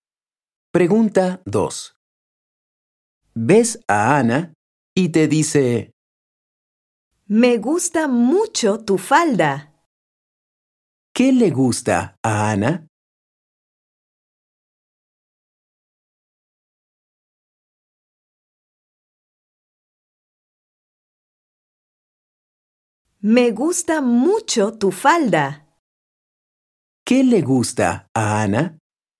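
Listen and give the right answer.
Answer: Tu falda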